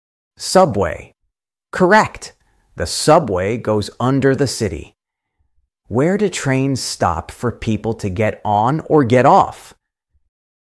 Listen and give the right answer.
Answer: Station. Exactly. A station is where trains stop.